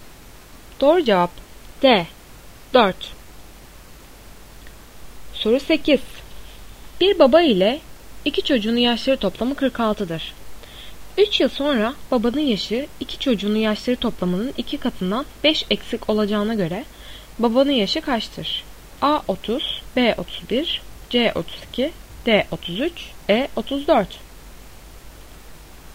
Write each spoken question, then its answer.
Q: 3 yıl sonra babanın yaşı iki çocuğunun yaşları toplamının 2 katından 5 eksik olacağına göre babanın yaşı kaçtır?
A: Doğru cevap C 32.